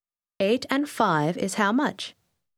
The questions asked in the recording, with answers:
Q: 8 and 5 is how much?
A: 13.